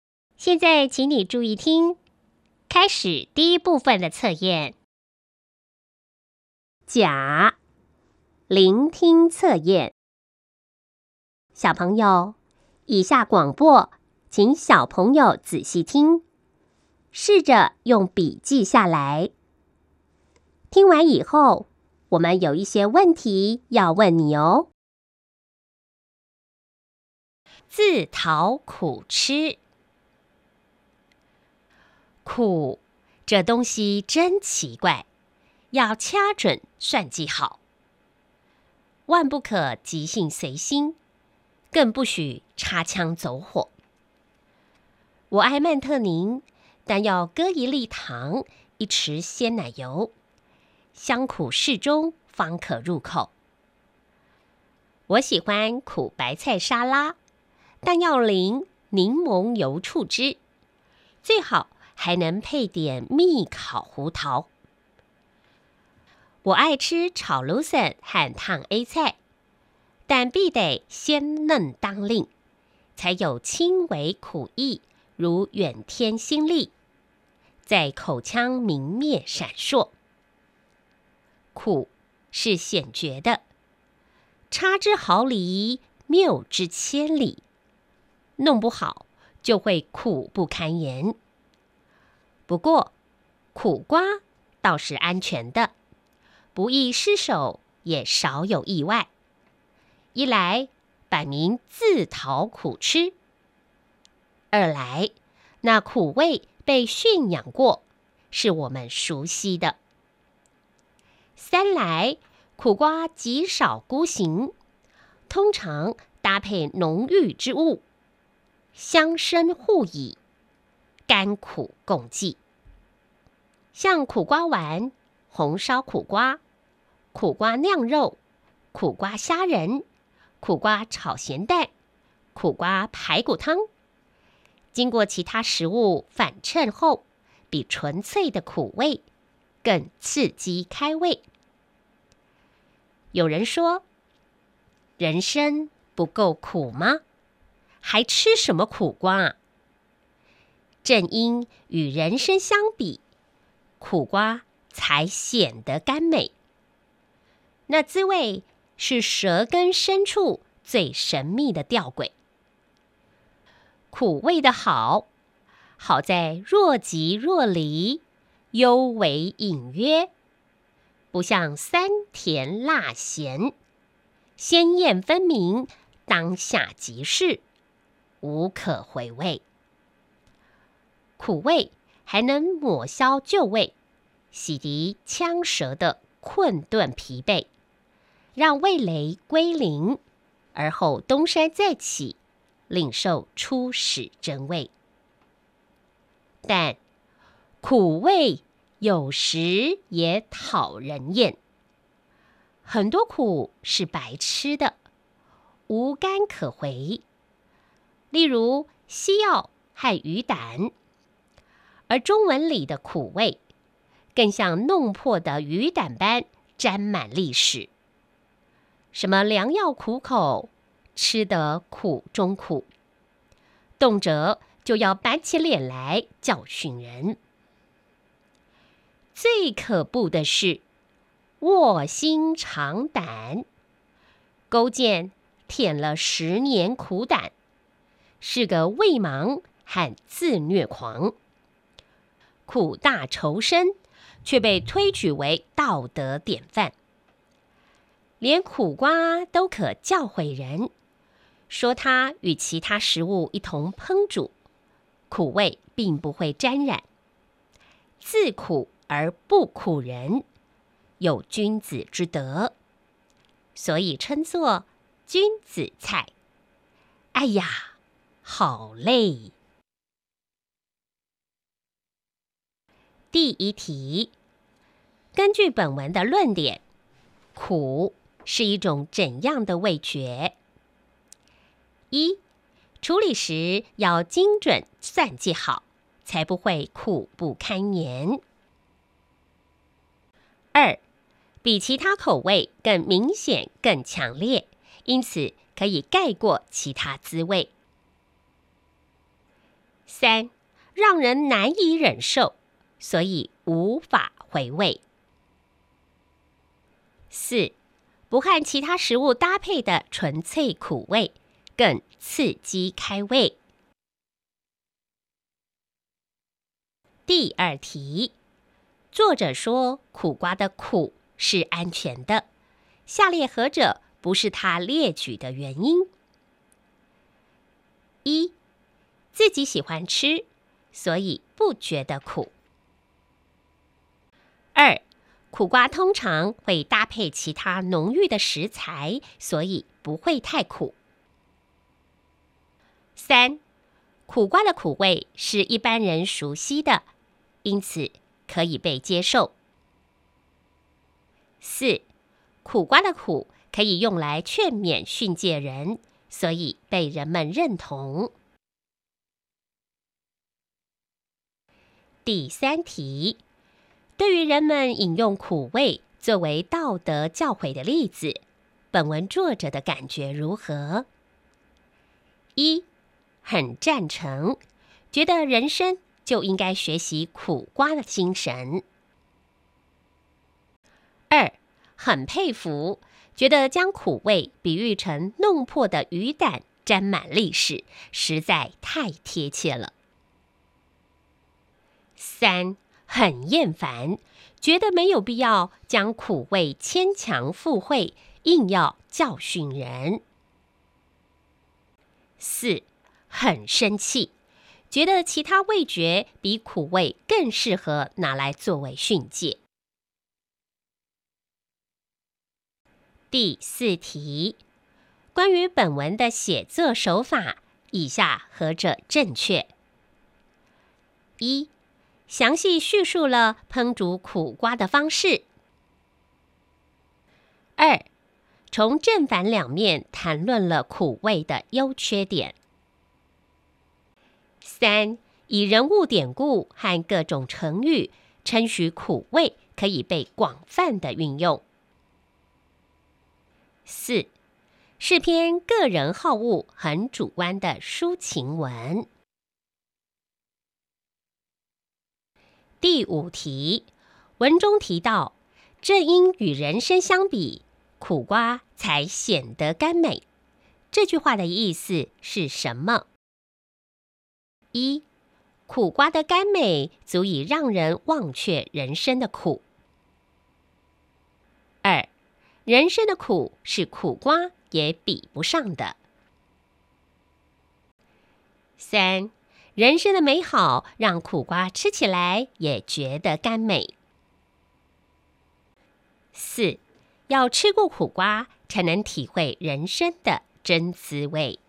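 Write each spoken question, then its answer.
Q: 根据本文的论点,苦是一种怎样的味觉?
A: 一:处理时要精准算计好,才不会苦不堪言。

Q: 对于人们饮用苦味作为道德教诲的例子,本文作者的感觉如何?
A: 三:很厌烦,觉得没有必要将苦味牵强附会,硬要教训人。

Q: 关于本文的写作手法,以下何者正确?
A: 二:从正反两面谈论了苦味的优缺点。

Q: 文中提到,正因与人参相比,苦瓜才显得甘美。这句话的意思是什么?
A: 二:人生的苦是苦瓜也比不上的。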